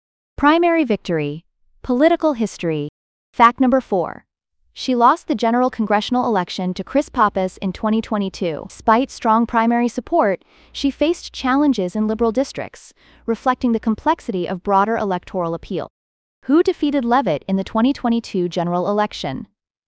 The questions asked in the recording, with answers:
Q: Who defeated Leavitt in the 2022 general election?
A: Correct answer, Chris Pappas.